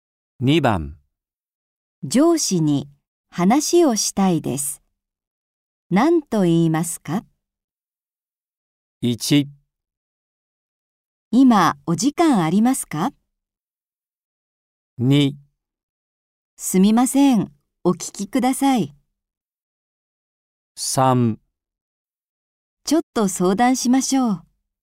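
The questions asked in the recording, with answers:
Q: 上司に話をしたいです。何と言いますか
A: 1: 今お時間ありますか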